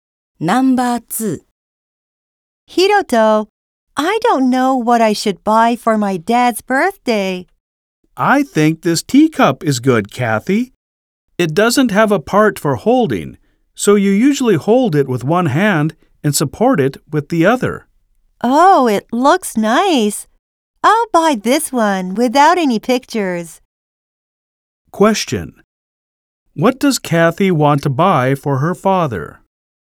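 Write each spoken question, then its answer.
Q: What does Kathy want to buy for her father?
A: A teacup without a handle and without any pictures.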